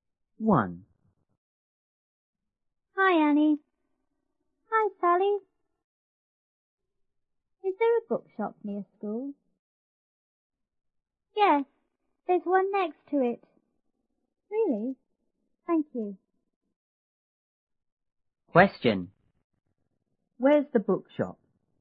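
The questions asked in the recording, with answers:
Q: Where's the bookshop?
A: Next to the school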